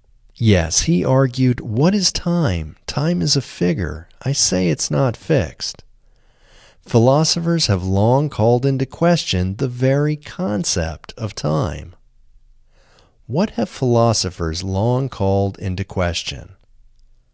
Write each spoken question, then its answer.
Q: What have philosophers long called into question?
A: Philosophers have long called into question the very concept of time.